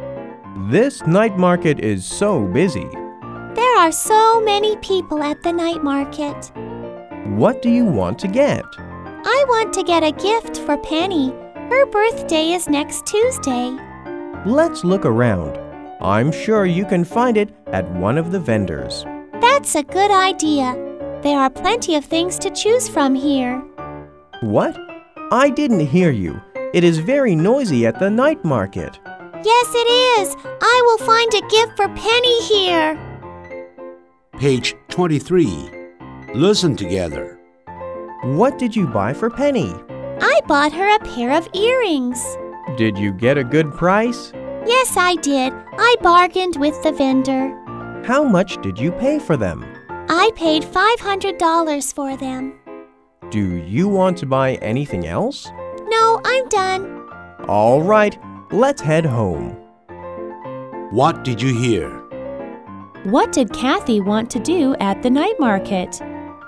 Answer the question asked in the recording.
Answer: She wanted to get a gift for Penny.